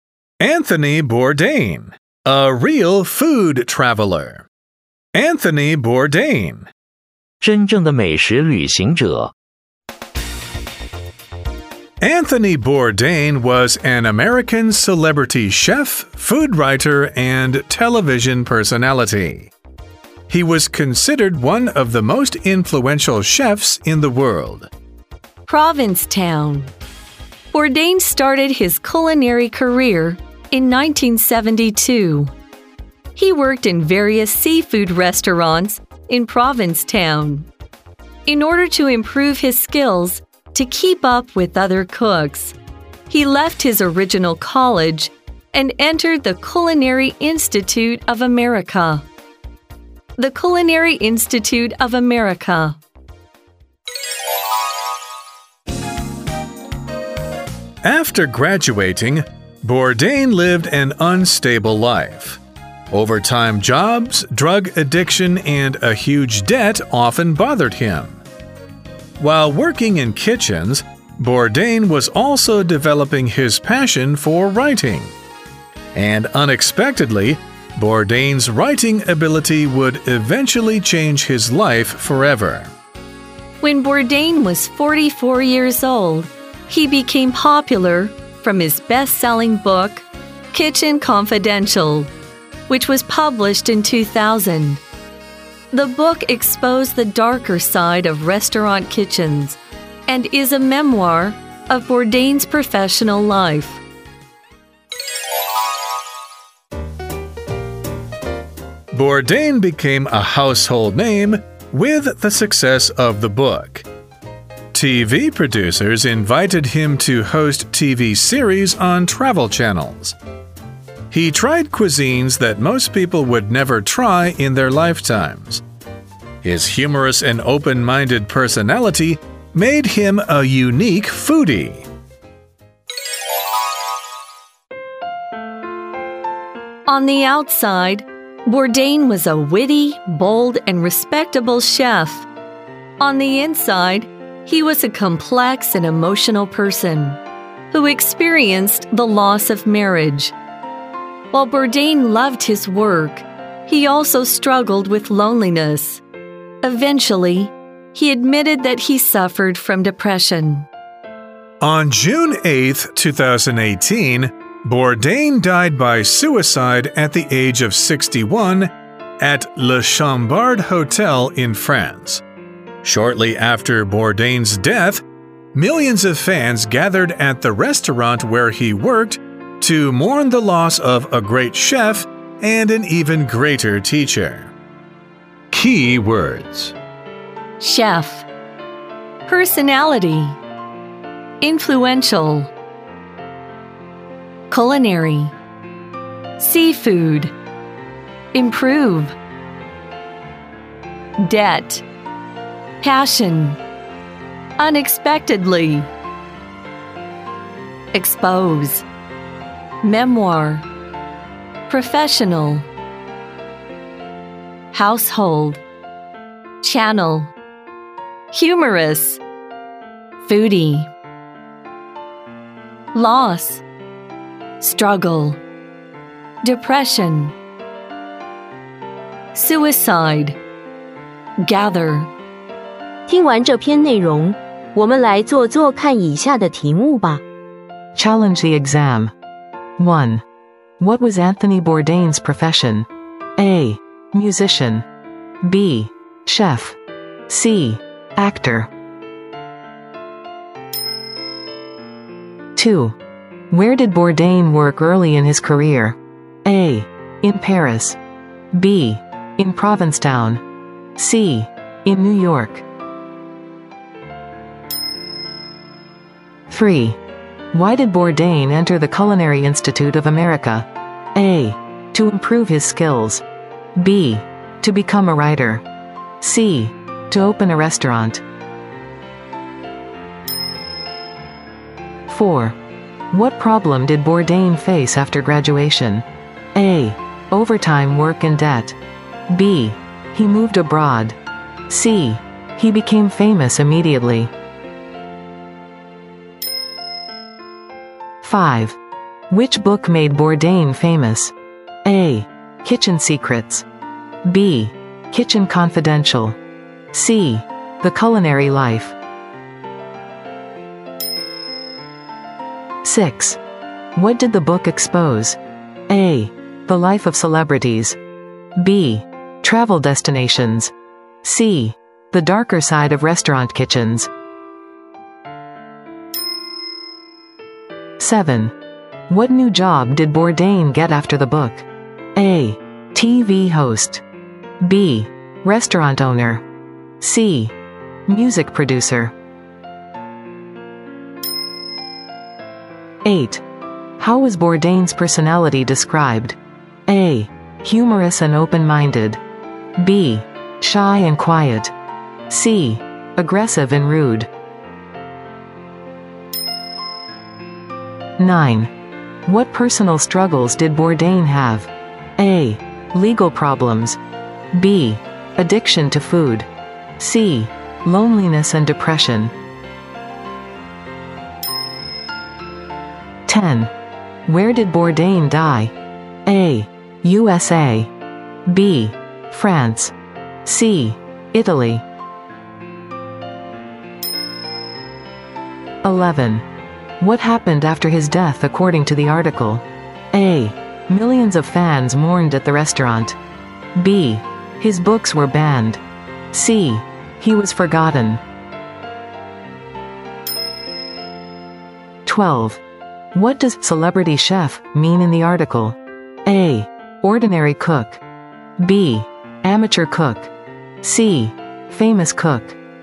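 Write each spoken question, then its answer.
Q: What was Anthony Bourdain's profession?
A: B: Chef

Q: Where did Bourdain work early in his career?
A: B: In Provincetown

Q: Why did Bourdain enter the Culinary Institute of America?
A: A: To improve his skills

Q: What problem did Bourdain face after graduation?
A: A: Overtime work and debt

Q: Which book made Bourdain famous?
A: B: Kitchen Confidential

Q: What did the book expose?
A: C: The darker side of restaurant kitchens

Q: What new job did Bourdain get after the book?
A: A: TV host

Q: How was Bourdain's personality described?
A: A: Humorous and open-minded

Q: What personal struggles did Bourdain have?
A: C: Loneliness and depression

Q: Where did Bourdain die?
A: B: France

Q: What happened after his death according to the article?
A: A: Millions of fans mourned at the restaurant

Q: What does celebrity chef mean in the article?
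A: C: Famous cook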